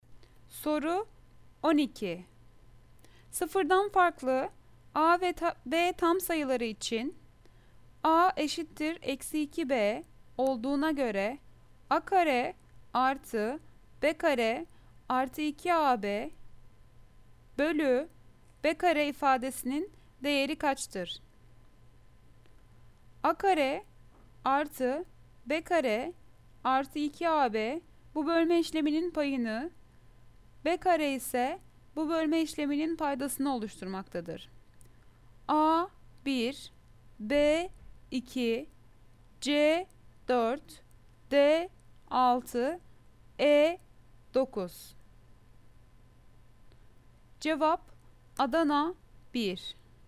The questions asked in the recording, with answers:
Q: Sıfırdan farklı A ve B tam sayıları için A eşittir eksi 2B olduğuna göre A kare artı B kare artı 2AB bölü B kare ifadesinin değeri kaçtır?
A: Cevap Adana 1.